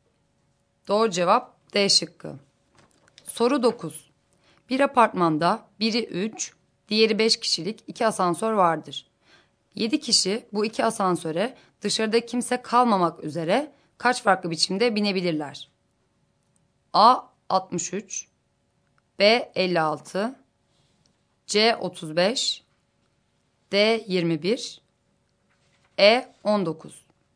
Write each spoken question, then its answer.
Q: 7 kişi bu 2 asansöre dışarıda kimse kalmamak üzere kaç farklı biçimde binebilirler?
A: Doğru cevap 56.